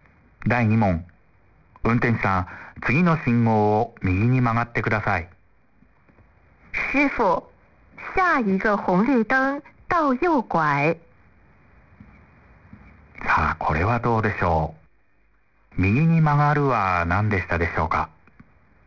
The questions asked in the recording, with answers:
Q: 第2問。運転手さん、次の信号を右に曲がってください。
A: 师傅、下一个红绿灯往右拐。